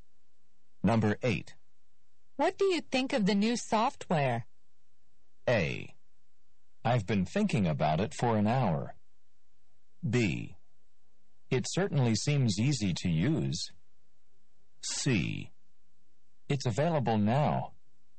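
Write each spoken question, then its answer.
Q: What do you think of the new software?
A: B: It certainly seems easy to use.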